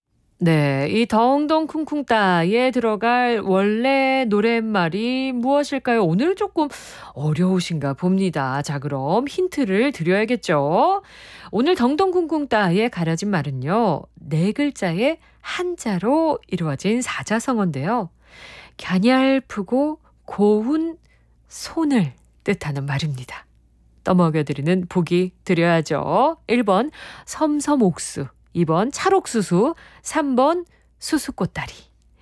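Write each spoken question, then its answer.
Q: 네, 이 덩덩 쿵쿵따에 들어갈 원래 노랫말이 무엇일까요?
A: 1번: 섬섬옥수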